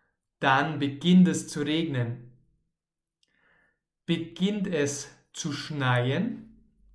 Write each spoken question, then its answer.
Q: Beginnt es zu schneien?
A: Nein, es beginnt nicht zu schneien, sondern zu regnen.